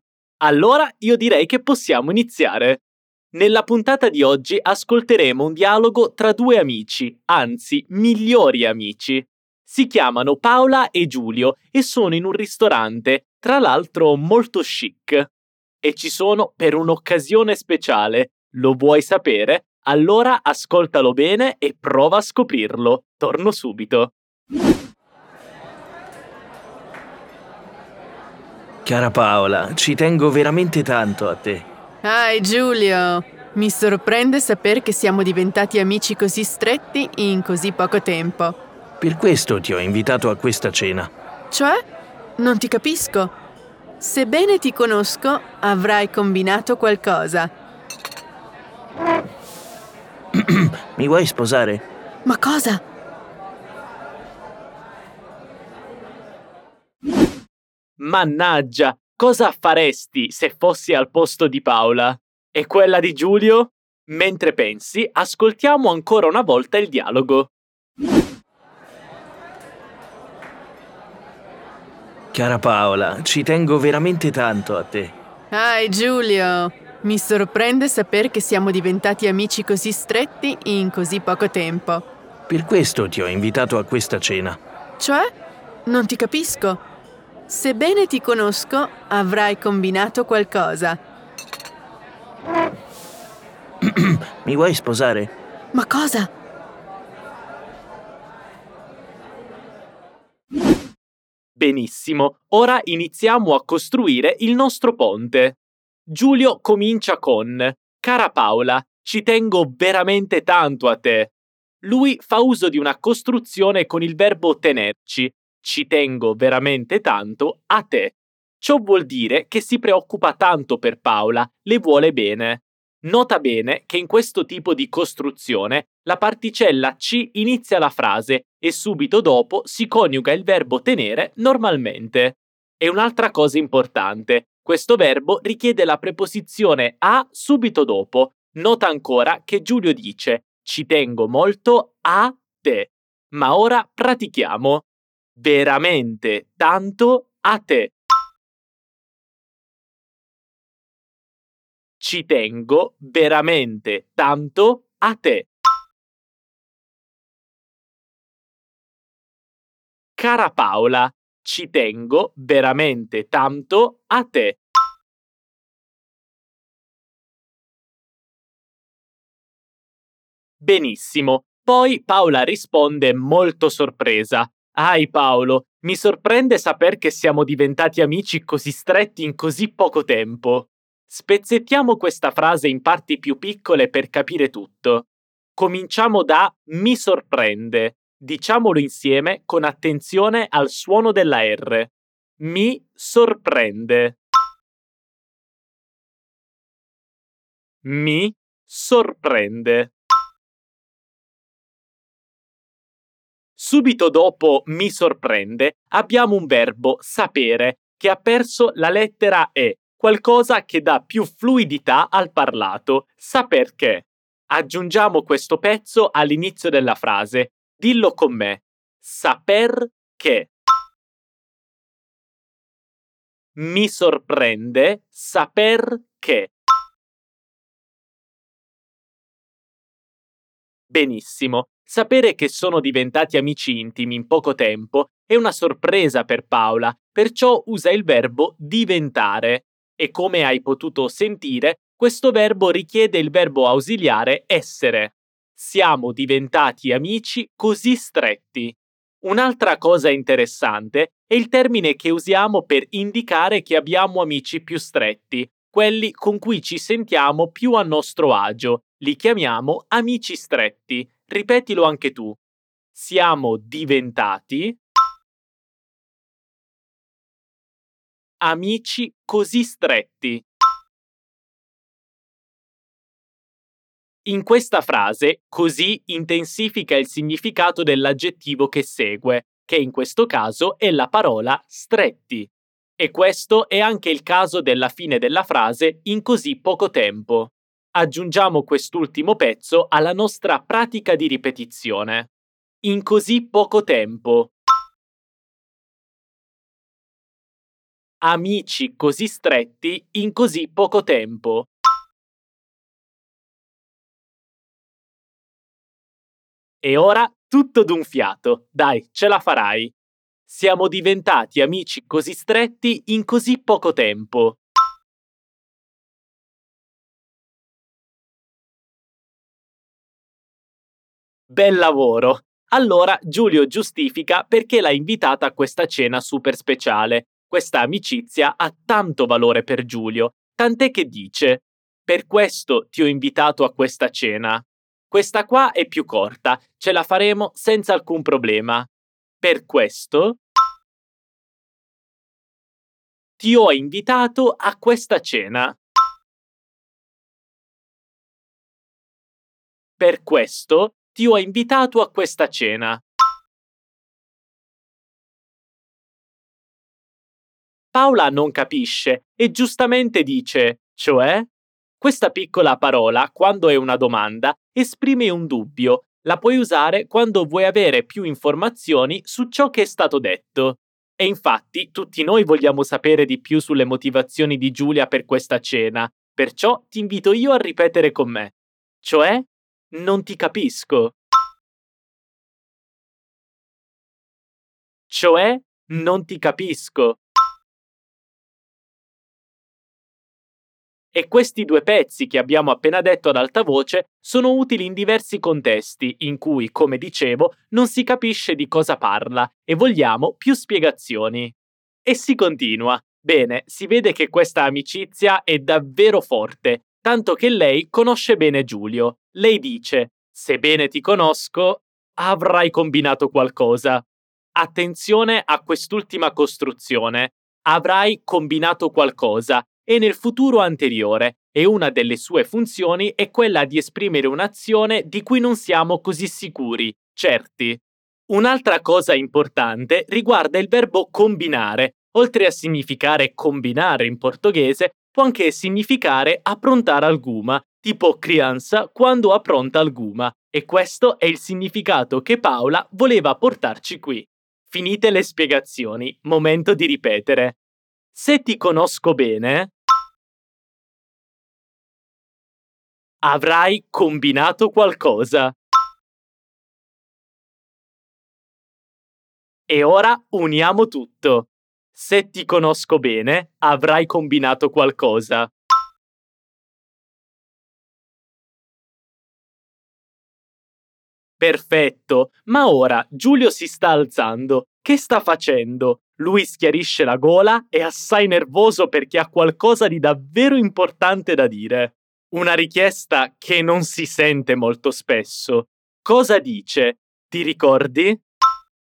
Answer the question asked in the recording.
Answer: Ecco, un bel «mi vuoi sposare?»